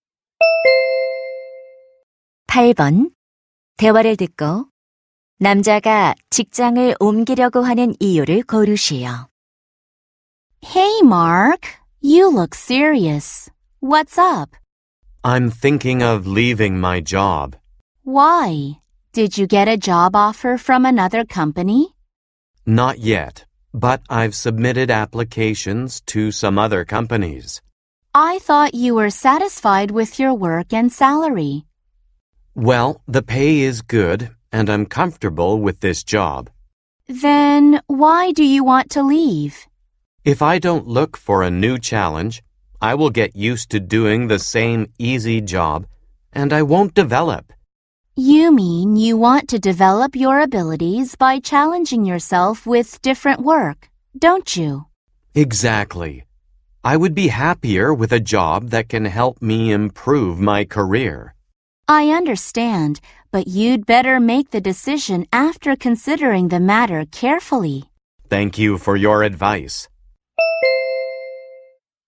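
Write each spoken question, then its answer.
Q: 대화를 듣고 남자가 직장을 옮기려고 하는 이유를 고르시오.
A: 새로운 일에 도전하며 능력을 키우고 싶어서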